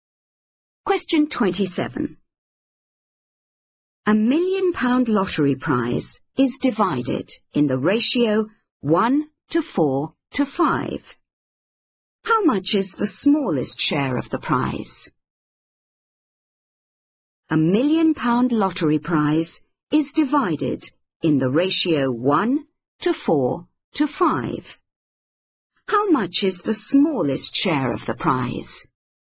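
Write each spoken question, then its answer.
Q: How much is the smallest share of the prize?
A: £100,000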